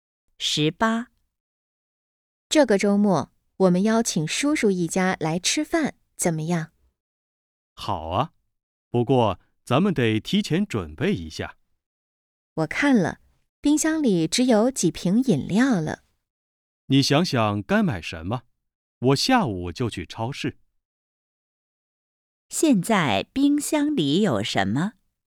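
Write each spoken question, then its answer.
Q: 现在冰箱里有什么?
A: 几瓶饮料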